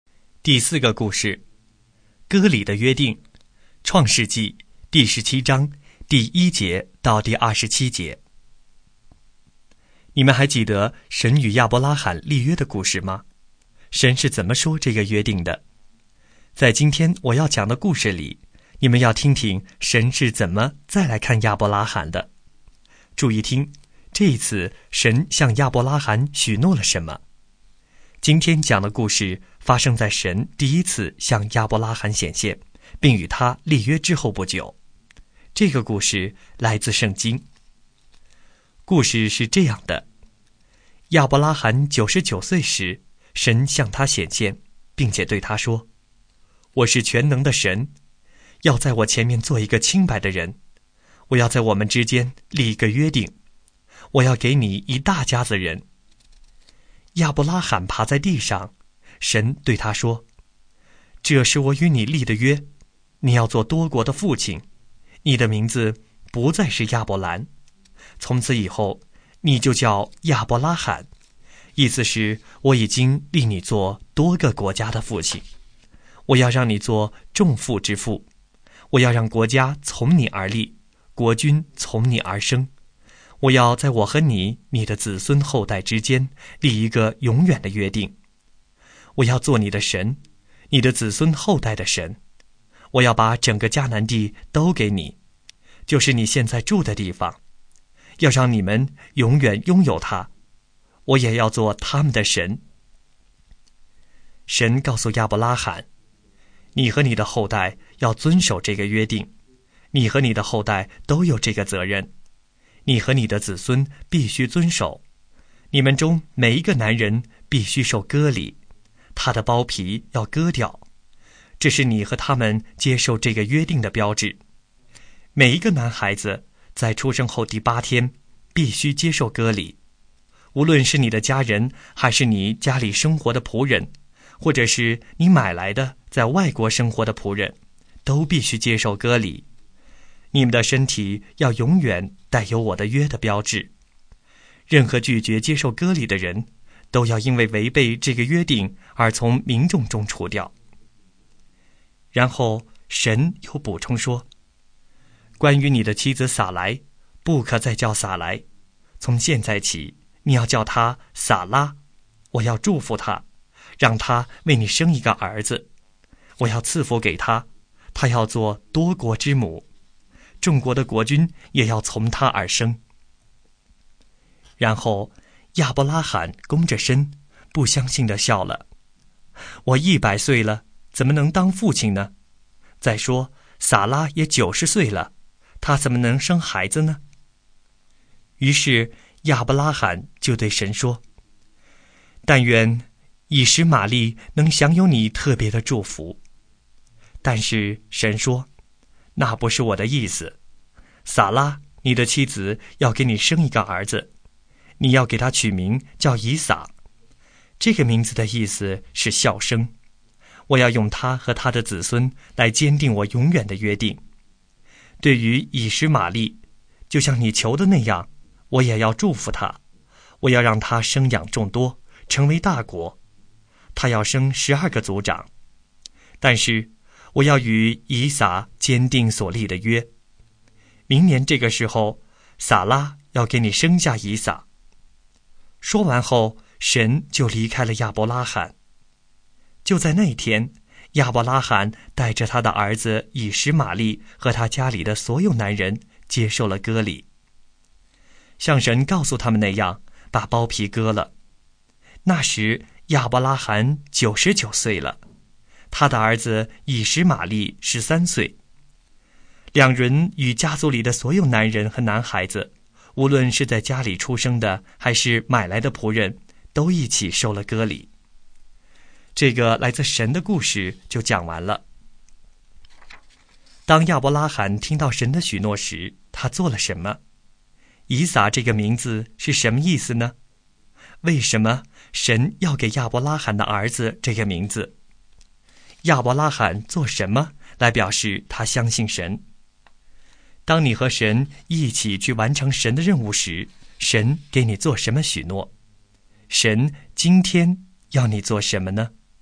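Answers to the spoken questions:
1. 他俯伏在地,不相信地笑了
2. 笑声
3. 他和家里所有男人都接受了割礼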